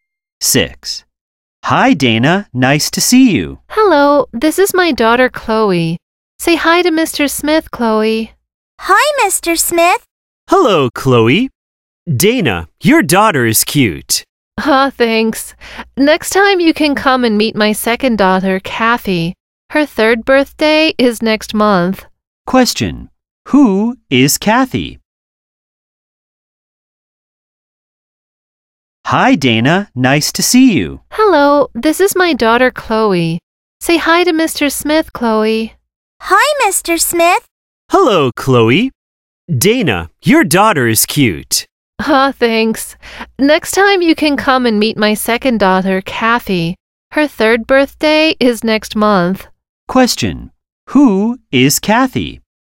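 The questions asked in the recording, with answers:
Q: Who is Kathy?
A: Dana's second daughter (turning three next month)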